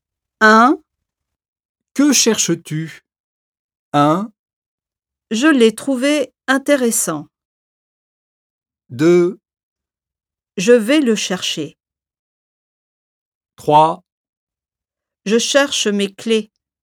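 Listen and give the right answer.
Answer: 3: Je cherche mes clés.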